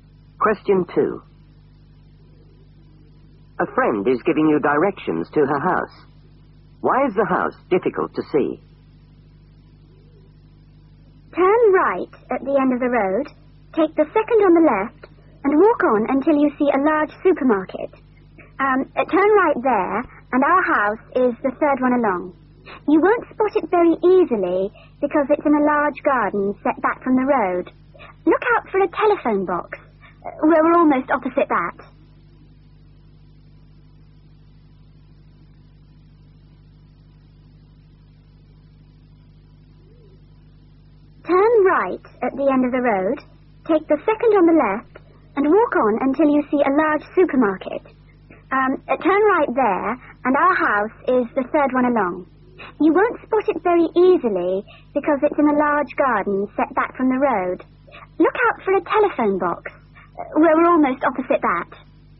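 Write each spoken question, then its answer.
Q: Why is the house difficult to see?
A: It's in a large garden set back from the road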